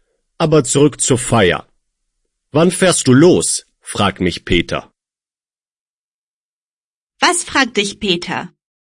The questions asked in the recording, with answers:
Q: Was fragt dich Peter?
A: Wann ich losfahre. Peter fragt mich, wann ich losfahre.